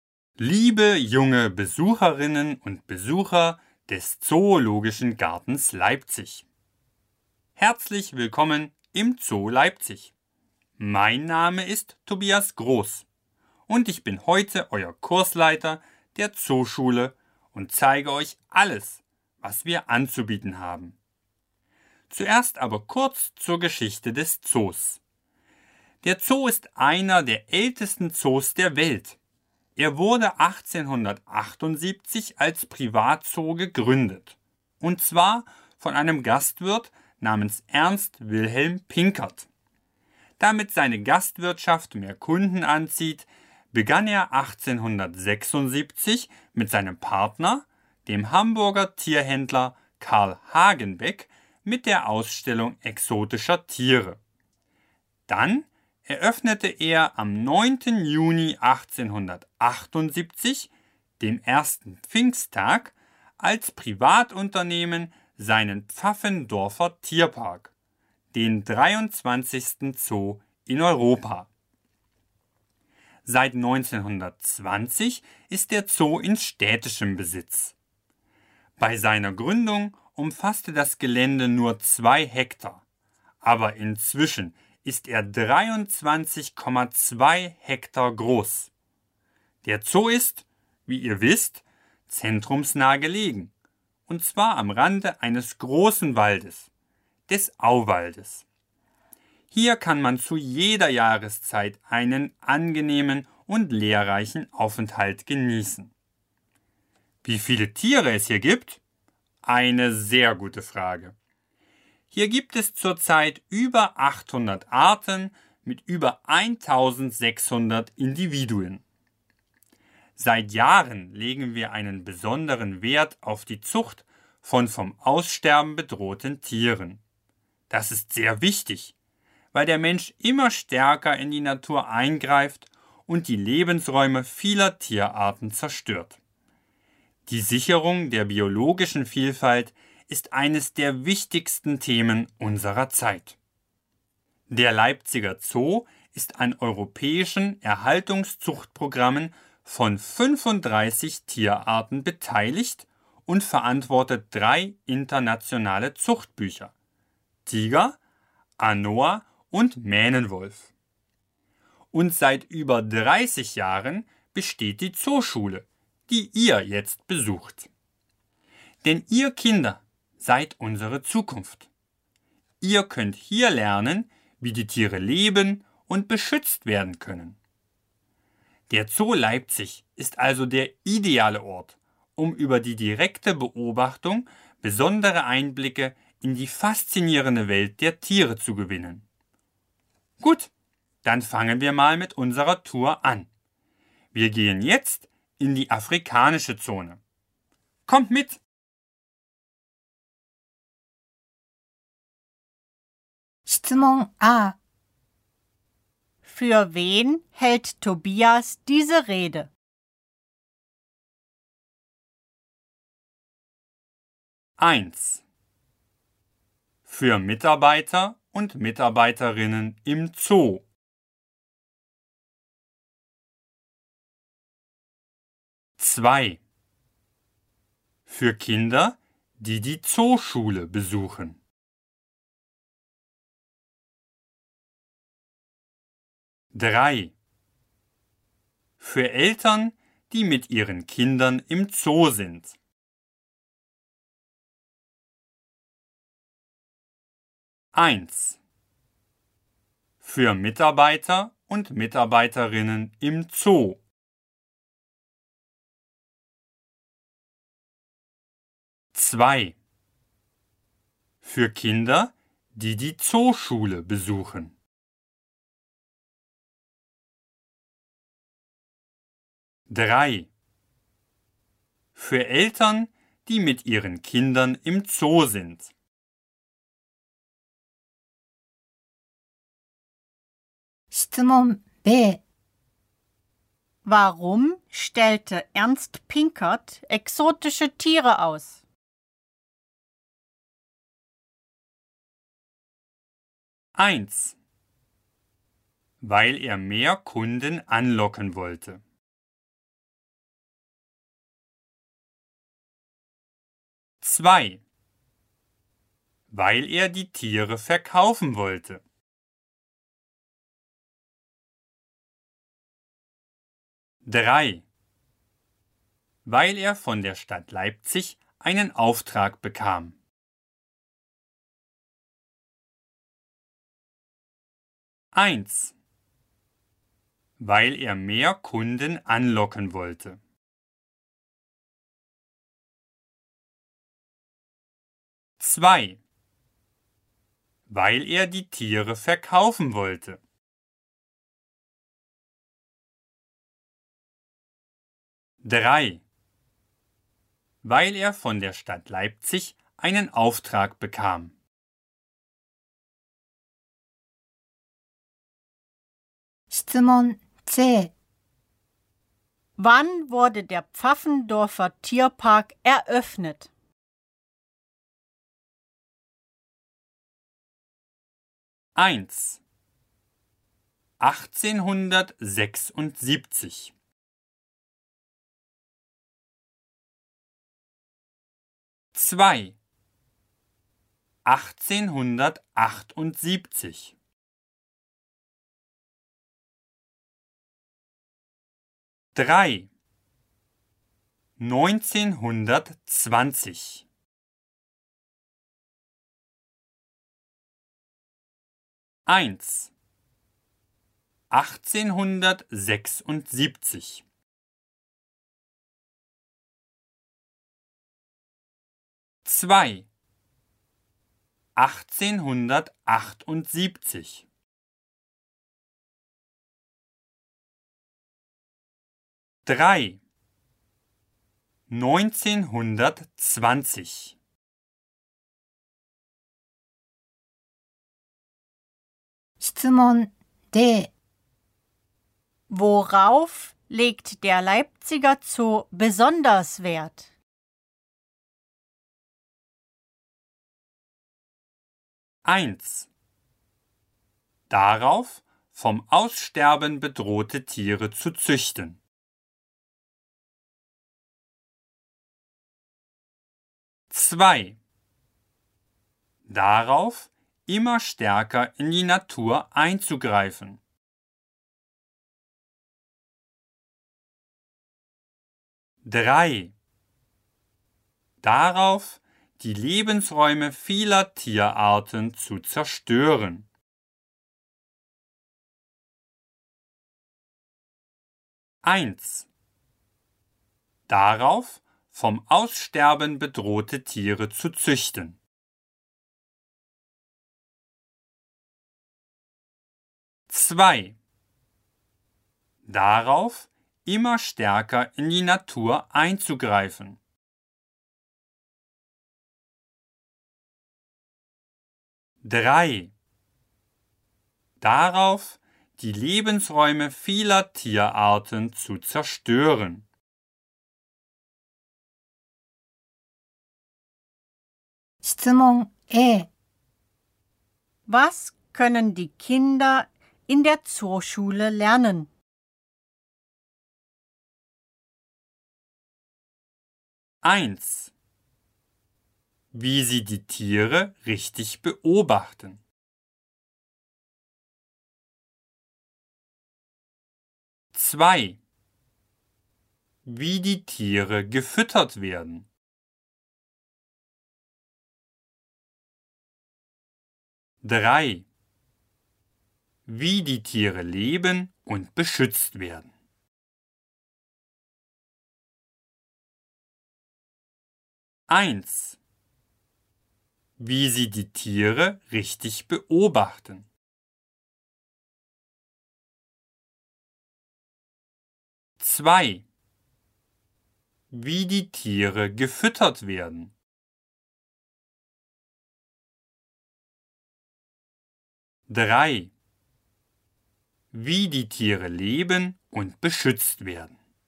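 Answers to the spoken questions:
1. 2: Für Kinder, die die Zooschule besuchen.
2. 1: Weil er mehr Kunden anlocken wollte.
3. 2: 1878
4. 1: Darauf, vom Aussterben bedrohte Tiere zu züchten.
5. 3: Wie die Tiere leben und beschützt werden.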